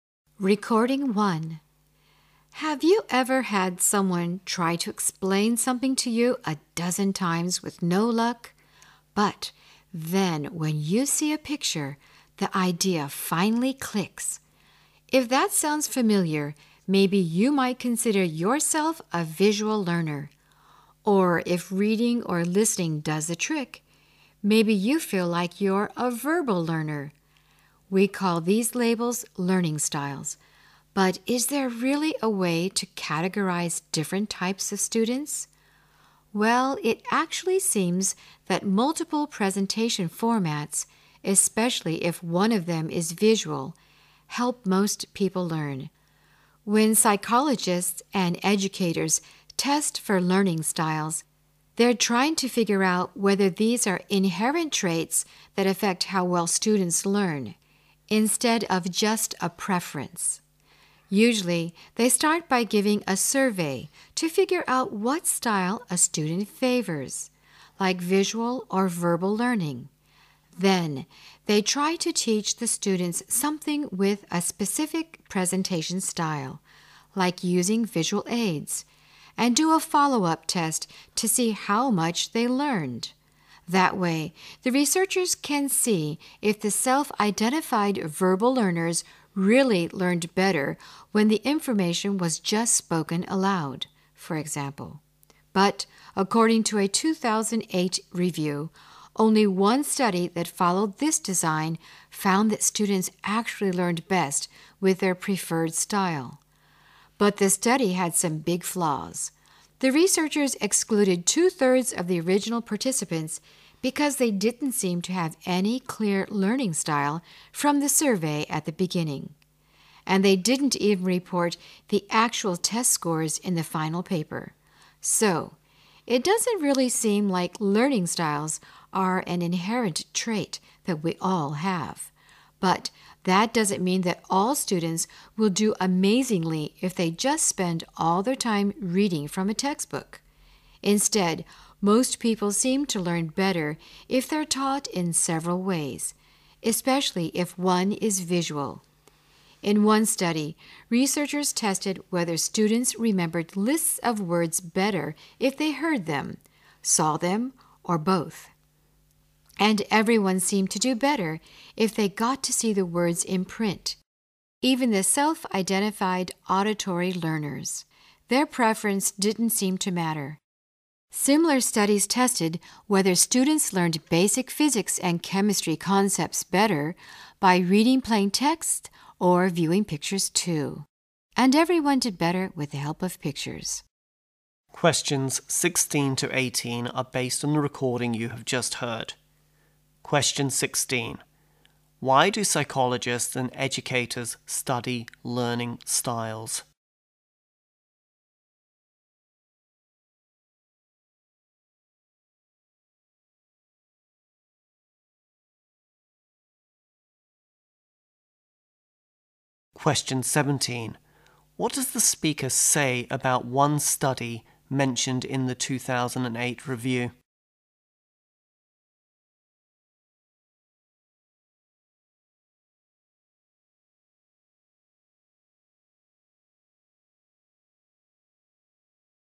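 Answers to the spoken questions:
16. To find out whether learning styles are inherent traits that affect how well students learn.
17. It had some big flaws.
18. People learn better when taught in several ways, especially with visuals.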